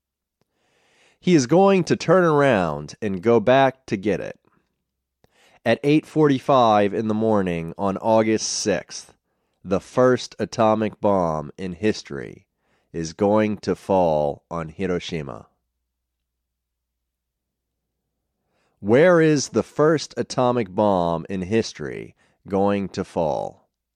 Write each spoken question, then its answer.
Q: Where is the first atomic bomb in history going to fall?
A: The first atomic bomb in history is going to fall on Hiroshima.